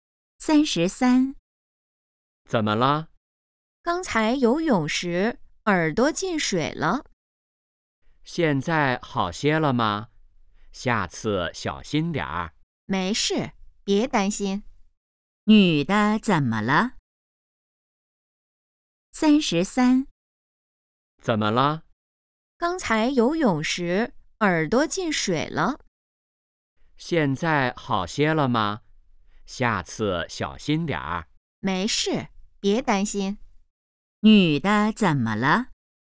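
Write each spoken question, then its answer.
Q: 女的怎么了?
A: 游泳时耳朵进水了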